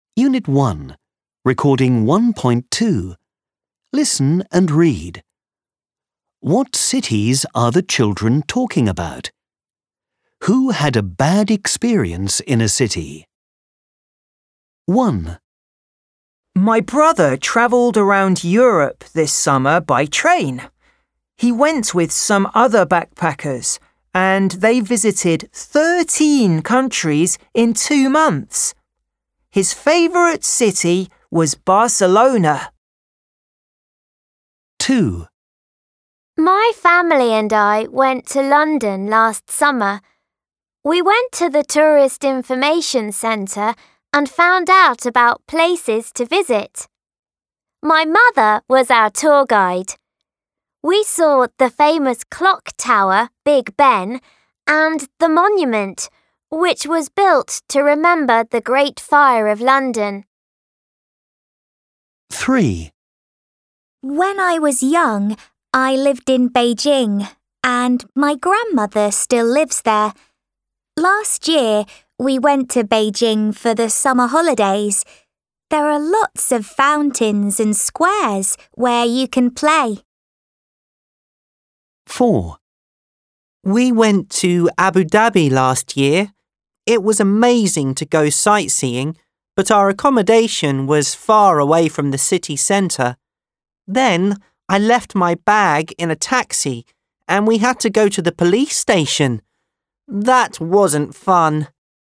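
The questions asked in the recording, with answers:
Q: What cities are the children talking about?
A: Barcelona, London, Beijing and Abu Dhabi

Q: Who had a bad experience in a city?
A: The fourth child, in Abu Dhabi (left a bag in a taxi)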